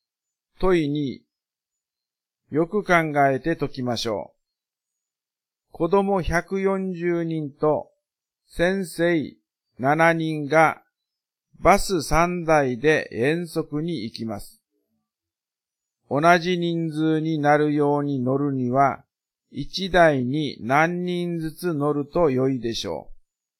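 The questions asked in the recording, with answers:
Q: 子供140人と先生7人がバス3台で遠足に行きます。同じ人数になるように乗るには、1台に何人ずつ乗ると良いでしょう。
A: 49人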